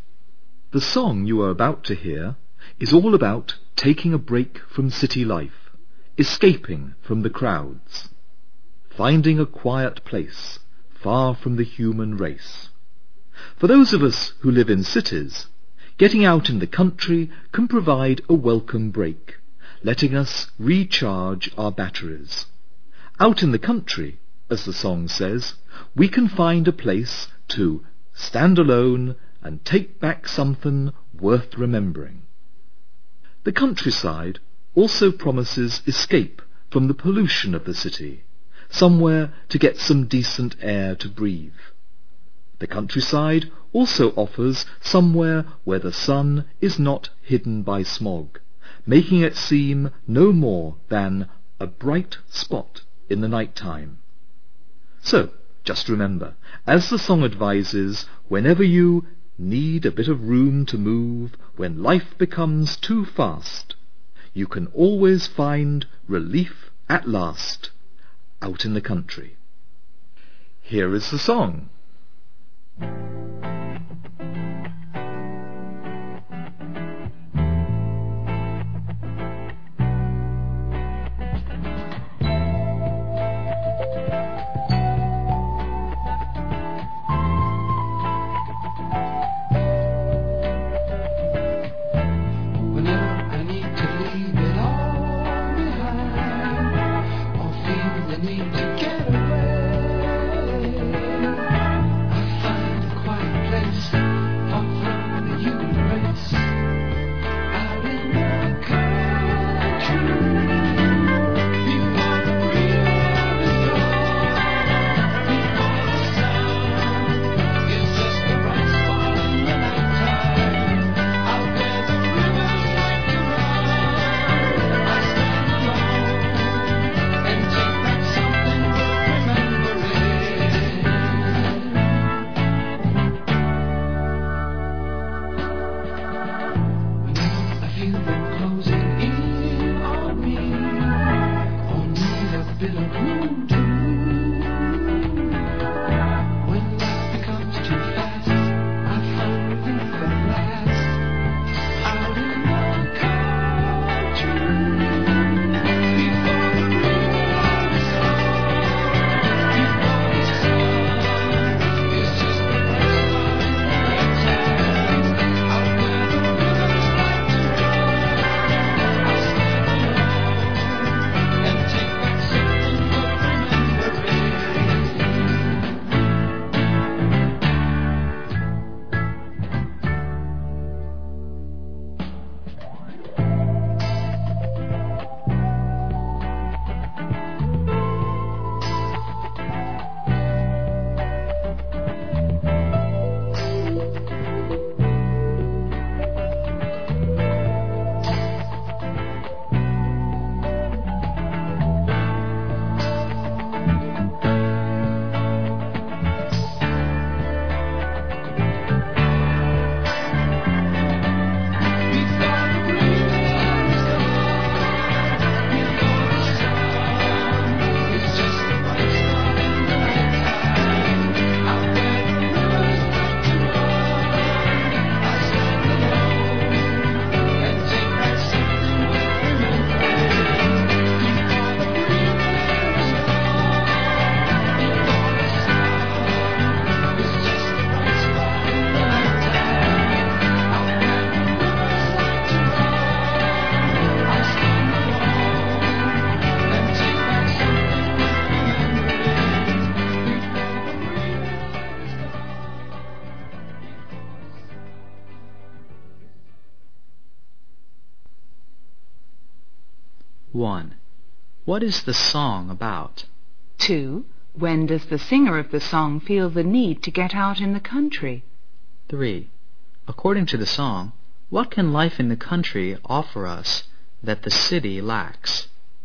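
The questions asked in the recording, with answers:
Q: What is the song about?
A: Taking a break from city life and escaping to a quiet place in the country

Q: When does the singer of the song feel the need to get out in the country?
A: When he needs room to move, when life becomes too fast

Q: According to the song, what can life in the country offer us that the city lacks?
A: A quiet place to stand alone, decent air to breathe, and sun not hidden by smog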